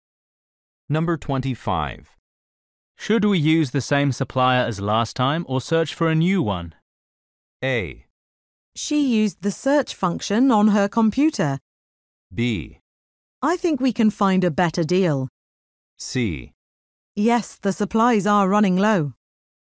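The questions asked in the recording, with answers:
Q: Should we use the same supplier as last time or search for a new one?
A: B: I think we can find a better deal.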